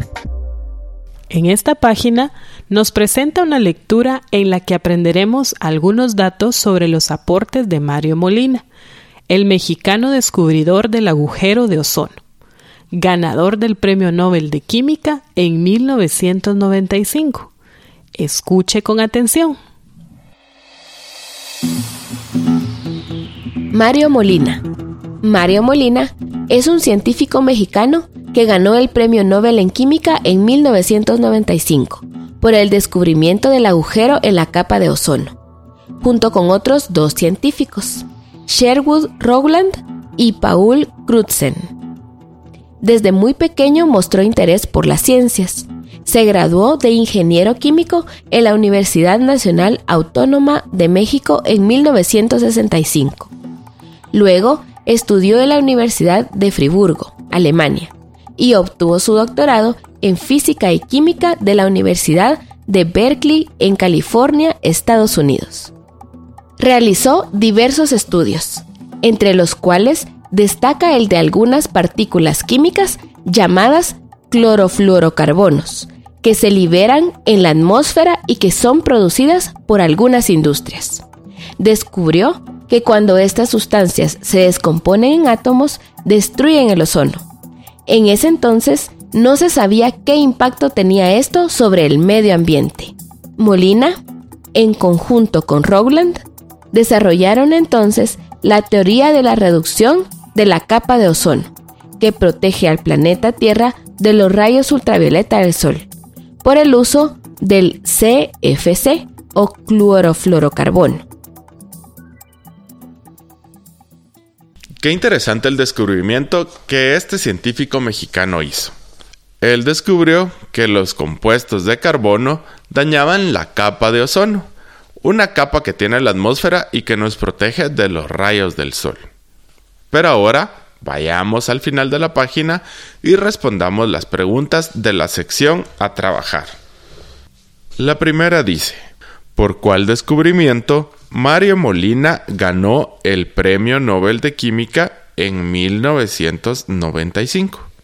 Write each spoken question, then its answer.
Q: ¿por cuál descubrimiento Mario Molina ganó el Premio Nobel de Química en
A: Mario Molina ganó el Premio Nobel de Química por el desarrollo de la teoría de la reducción de la capa de ozono a causa de unas sustancias contaminantes llamadas clorofluorocarbonos, o CFC, que algunas industrias liberan a la atmósfera.